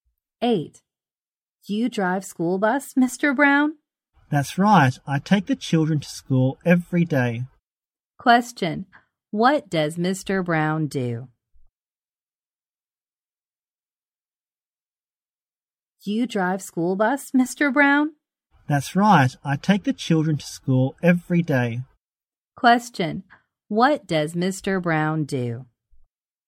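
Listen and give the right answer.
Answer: He drives a school bus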